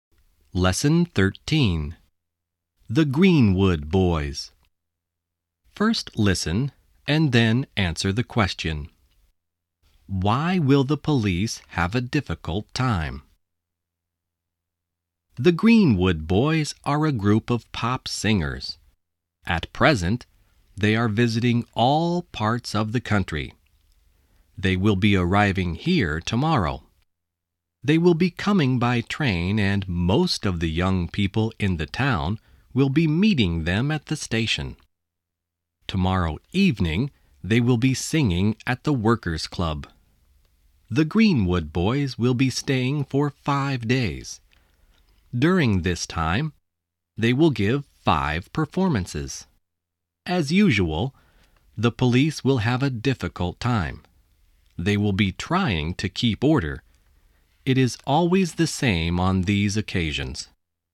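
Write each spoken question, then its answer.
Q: Why will the police have a difficult time?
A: Because they will be trying to keep order when the Greenwood Boys come.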